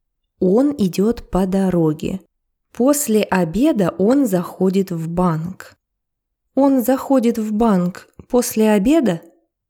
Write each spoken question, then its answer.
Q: Он заходит в банк после обеда?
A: Да, он заходит в банк после обеда.